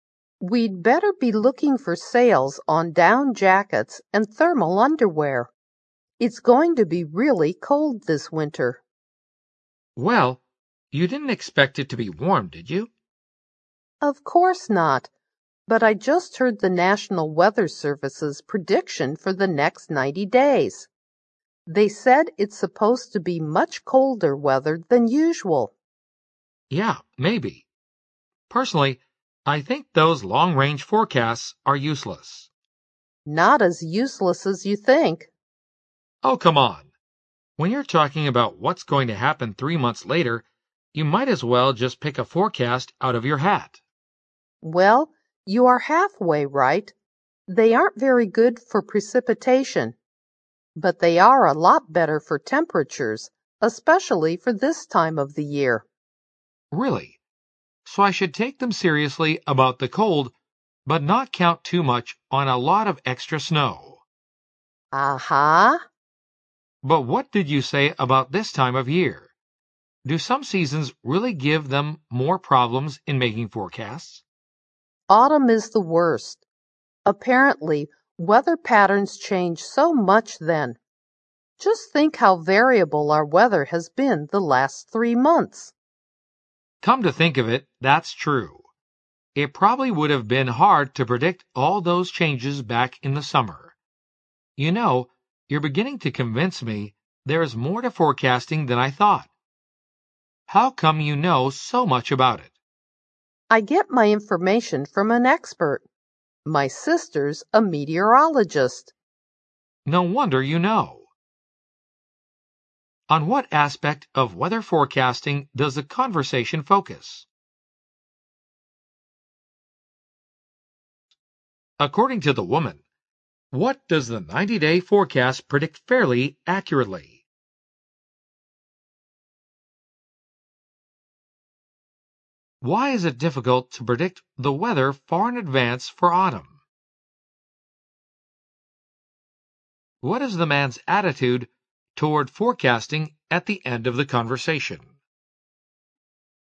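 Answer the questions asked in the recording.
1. The accuracy of long-range (90-day) forecasts
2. Temperatures
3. Weather patterns change a lot in autumn
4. He is starting to think there is more to it than he thought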